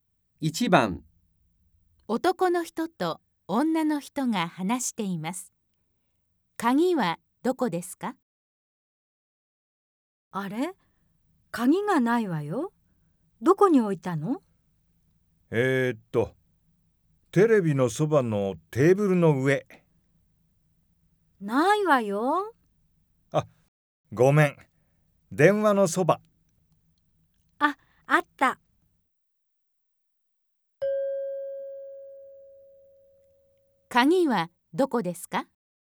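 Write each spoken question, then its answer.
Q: 鍵はどこですか?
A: 電話のそば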